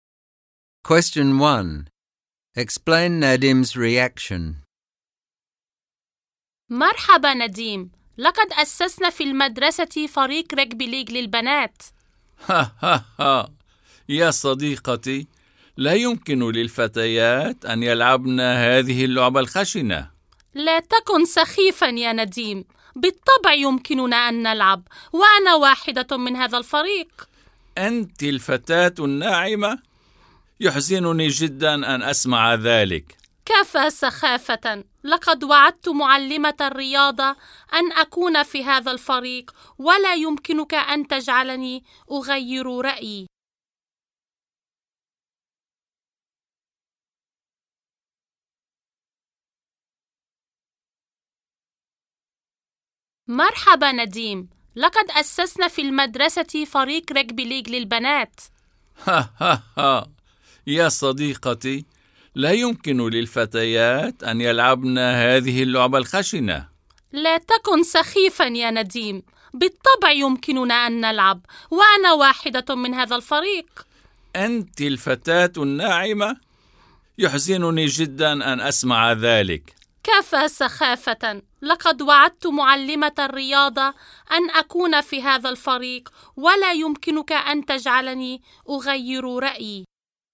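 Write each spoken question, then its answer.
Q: Explain Nadim's reaction.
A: He thinks girls can't play rugby league because it's too rough, and he's sad that a gentle girl like his friend is on the team.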